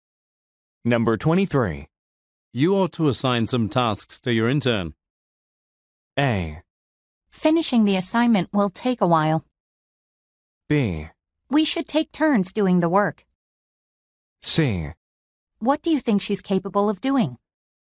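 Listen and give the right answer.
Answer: C: What do you think she's capable of doing?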